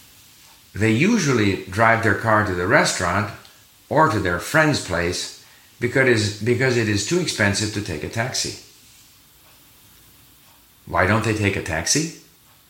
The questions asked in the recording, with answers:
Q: Why don't they take a taxi?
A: Because it's too expensive to take a taxi.